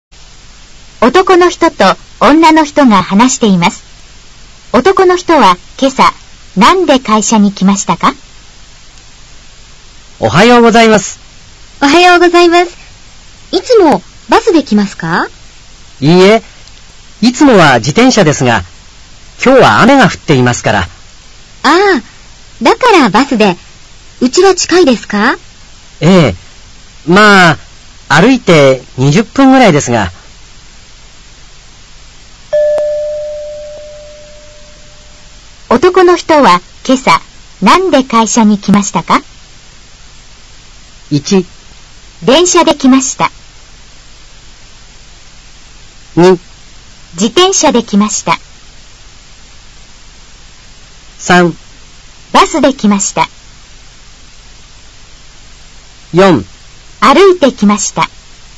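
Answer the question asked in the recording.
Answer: 3: バスで来ました。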